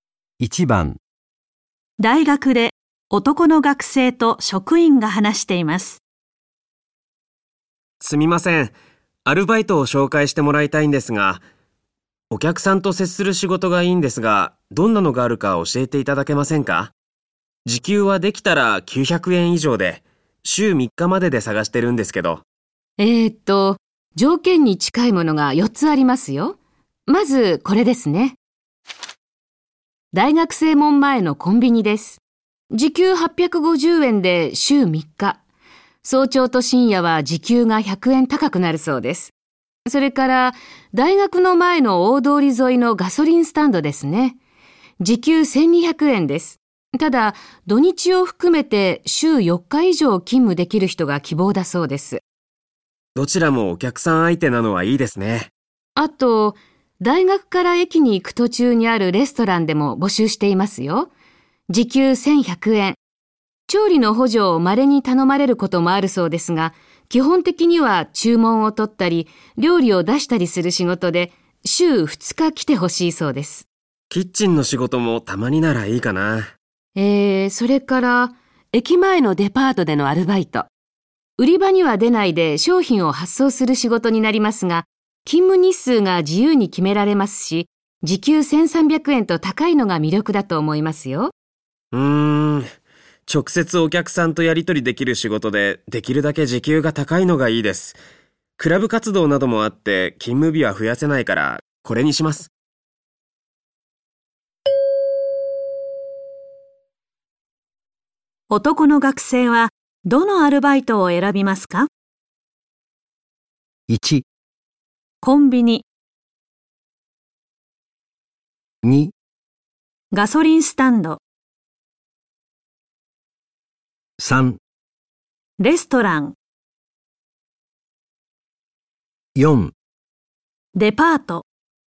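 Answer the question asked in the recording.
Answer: 3: レストラン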